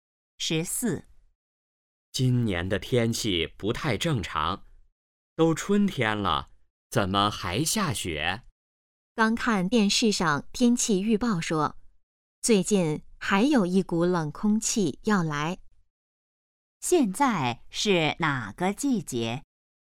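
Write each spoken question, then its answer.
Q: 现在是哪个季节?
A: 春天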